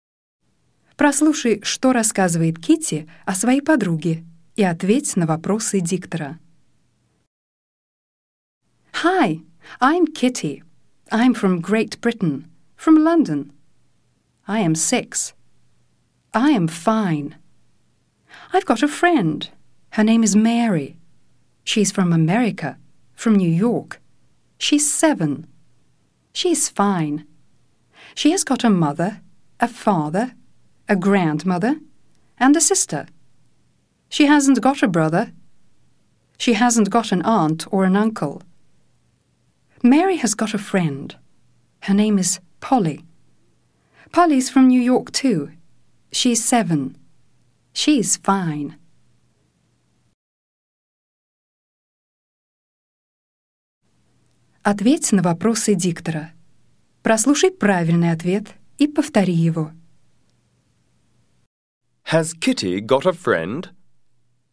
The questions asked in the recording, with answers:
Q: Has Kitty got a friend?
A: Yes, she has.